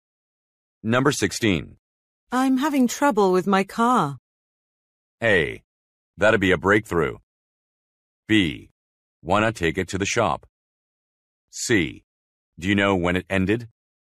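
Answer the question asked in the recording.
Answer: B: Why not take it to the shop?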